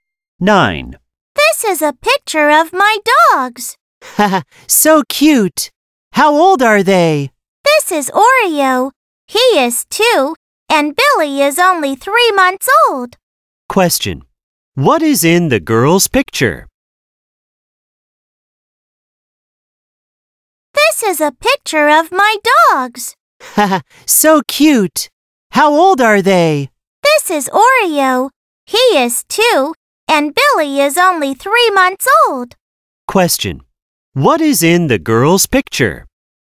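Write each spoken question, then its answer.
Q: what is in the girl's picture?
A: Her dogs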